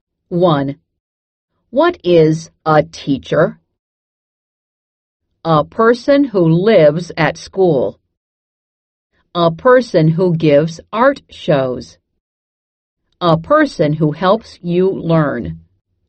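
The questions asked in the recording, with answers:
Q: What is a teacher?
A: A person who helps you learn.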